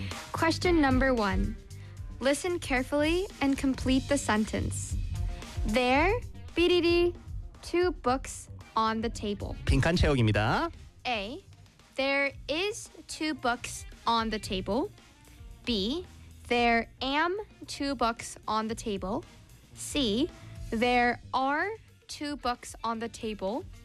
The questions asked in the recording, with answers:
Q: Listen carefully and complete the sentence.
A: 네, 정답은 C입니다.